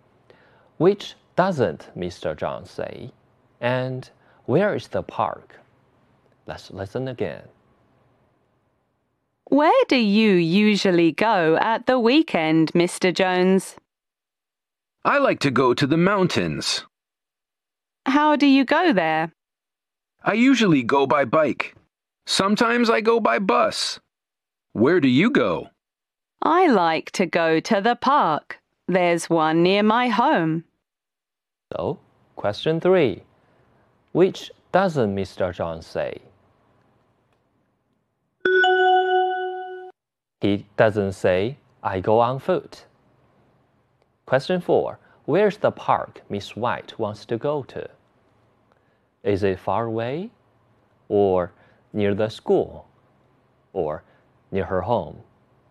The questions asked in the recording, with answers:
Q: Where's the park Miss White wants to go to?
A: So we choose C.